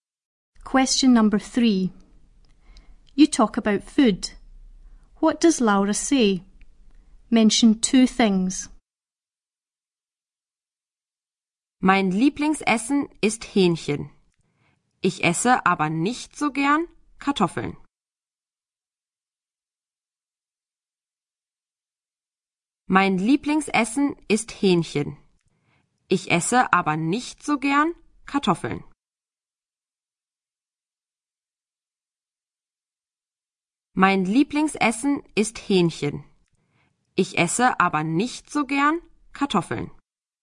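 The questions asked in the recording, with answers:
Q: What does Laura say? Mention two things.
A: Her favourite food is chicken; she doesn't like potatoes much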